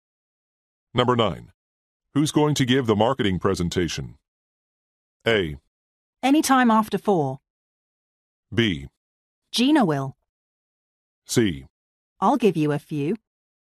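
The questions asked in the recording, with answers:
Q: Who's going to give the marketing presentation?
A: B: Gina will.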